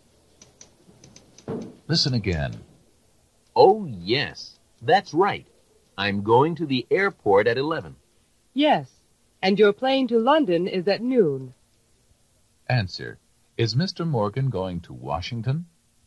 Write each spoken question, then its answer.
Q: Answer. Is Mr. Morgan going to Washington?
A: No, he's not.